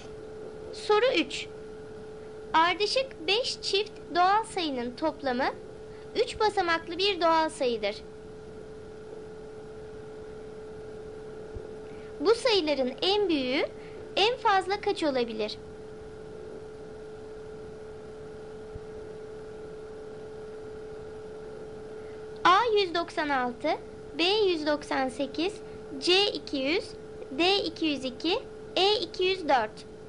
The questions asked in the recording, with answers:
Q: Bu sayıların en büyüğü en fazla kaç olabilir?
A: Doğru cevap D 202.